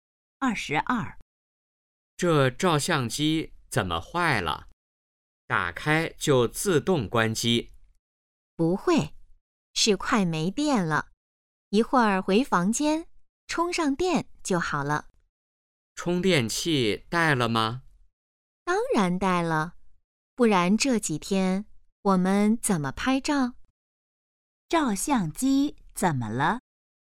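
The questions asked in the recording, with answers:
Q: 照相机怎么了?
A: 快没电了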